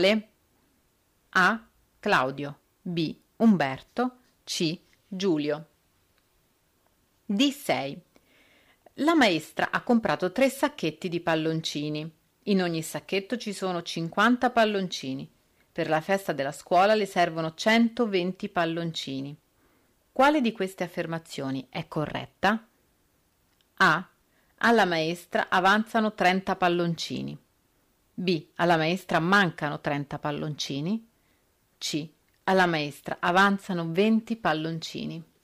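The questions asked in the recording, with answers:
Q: Quale di queste affermazioni è corretta?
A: A: Alla maestra avanzano 30 palloncini.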